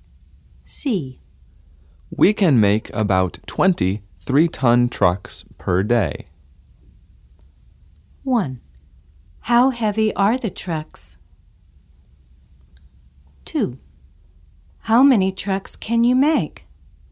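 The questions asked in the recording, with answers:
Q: How heavy are the trucks?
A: 3 tons

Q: How many trucks can you make?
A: About 20 per day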